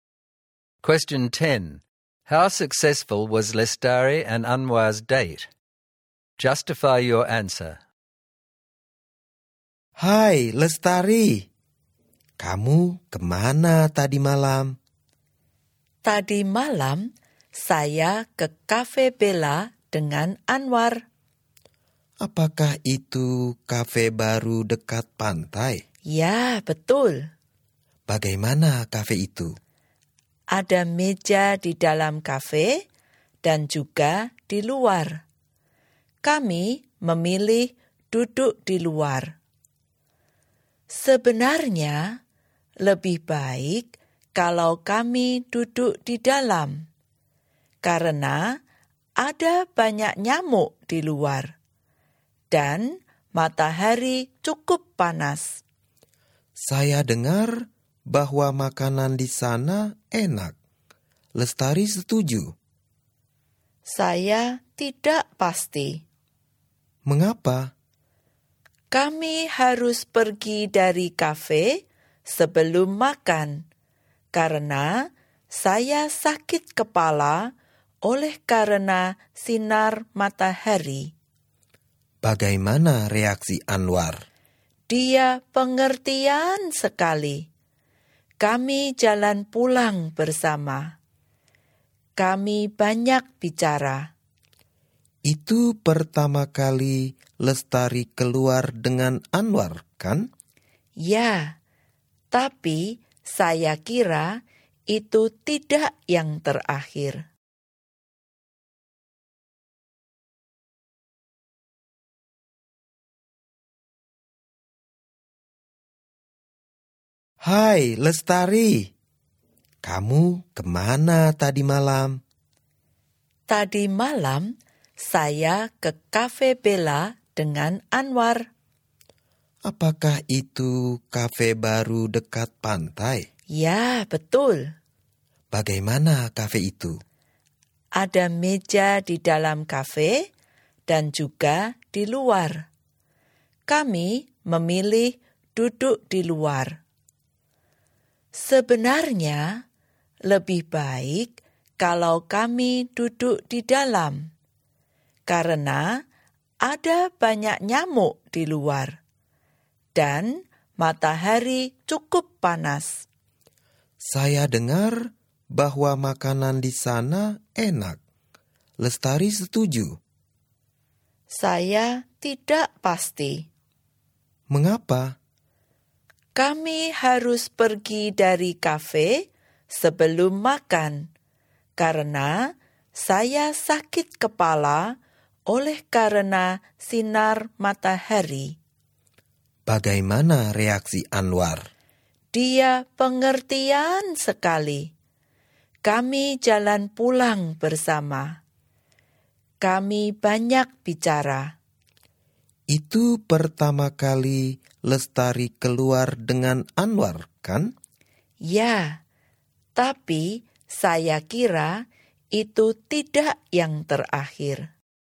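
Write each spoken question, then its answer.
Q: How successful was Lestari and Anwar's date?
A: Fairly successful: the café was bad and they left before eating, but Anwar was understanding, they talked a lot and she thinks it won't be the last date.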